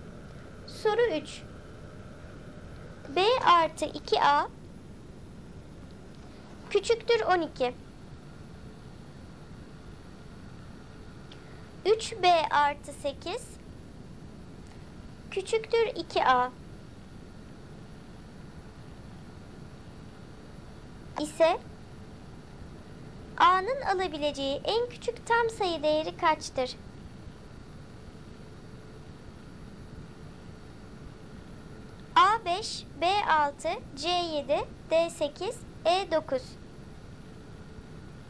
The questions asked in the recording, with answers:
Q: ise A'nın alabileceği en küçük tam sayı değeri kaçtır?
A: Doğru cevap A5.